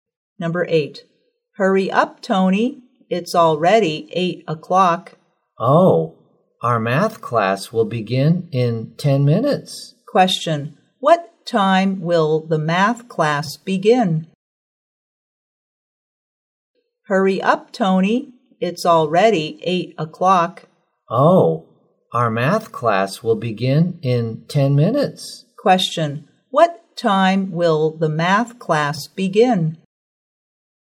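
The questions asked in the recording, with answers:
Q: What time will the math class begin?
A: At 8:10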